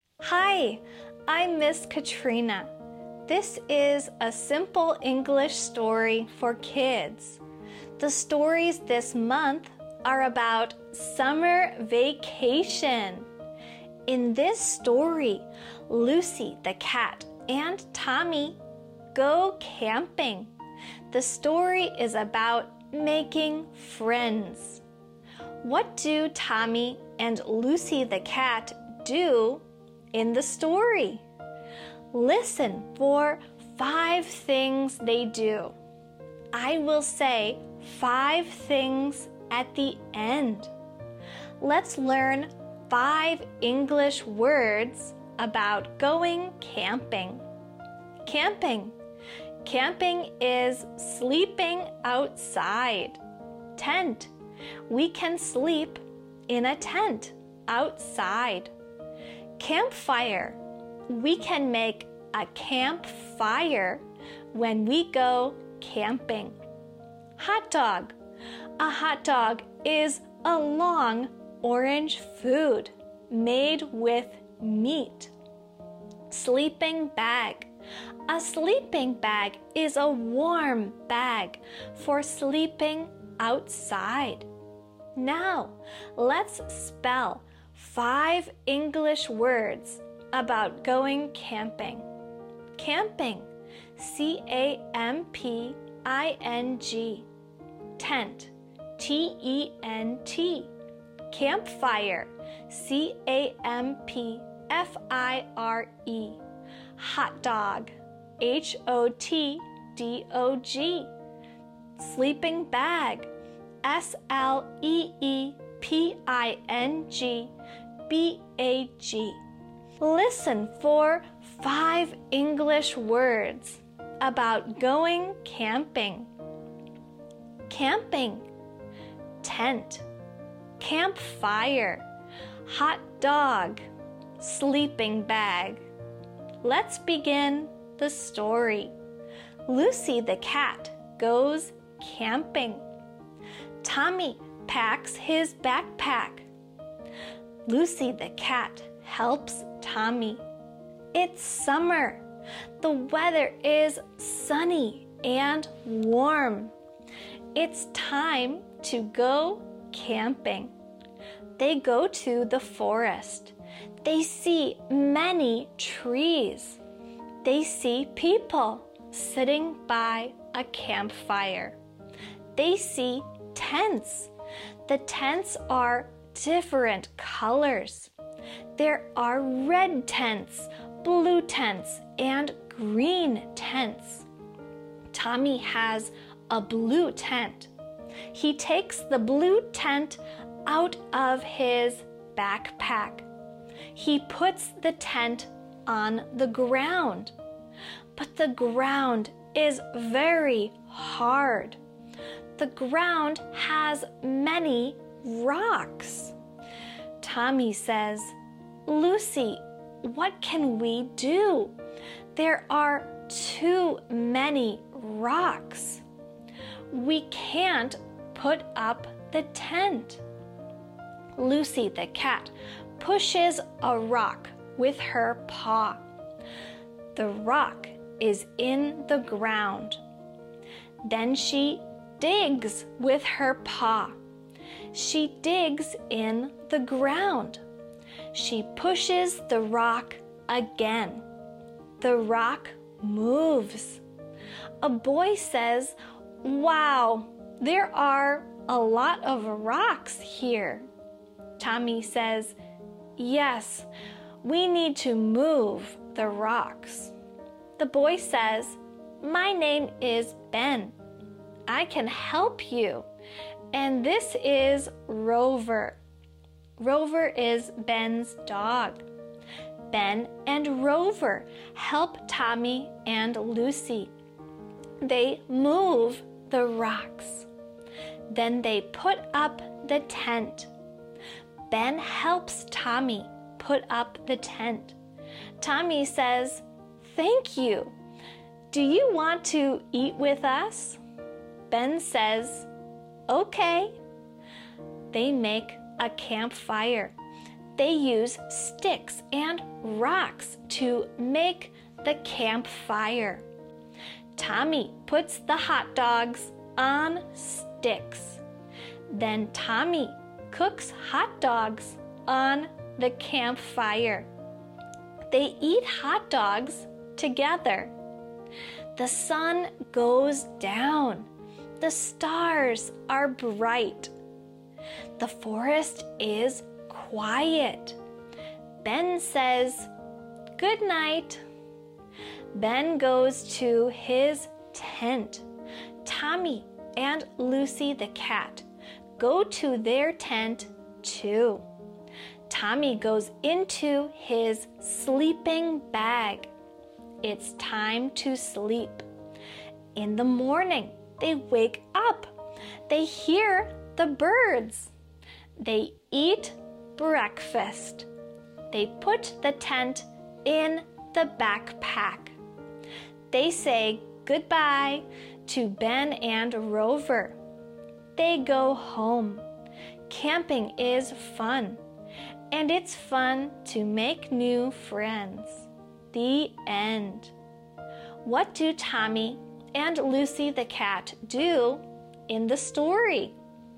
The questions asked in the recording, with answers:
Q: What do Tommy and Lucy the cat do in the story?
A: 1. They go to the forest. 2. They move rocks. 3. They put up the tent. 4. They make a campfire. 5. They go to sleep.